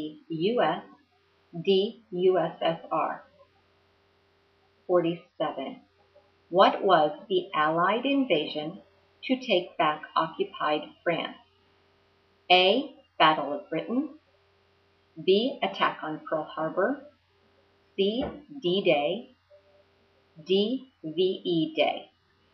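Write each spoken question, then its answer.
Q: What was the Allied invasion to take back occupied France?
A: C: D-Day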